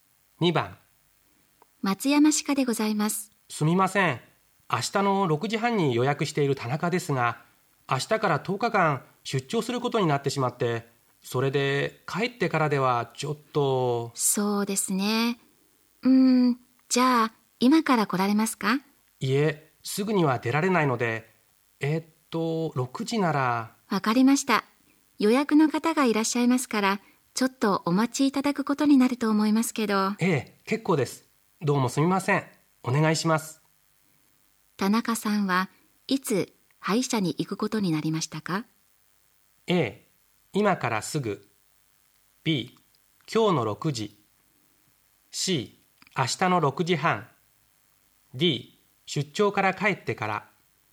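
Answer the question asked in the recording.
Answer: B: 今日の6時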